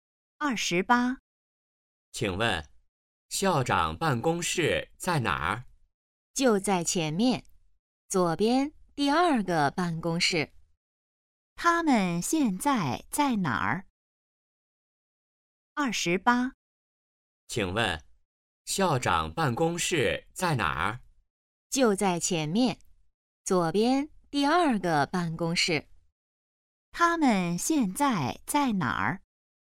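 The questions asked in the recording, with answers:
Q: 他们现在在哪儿?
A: 学校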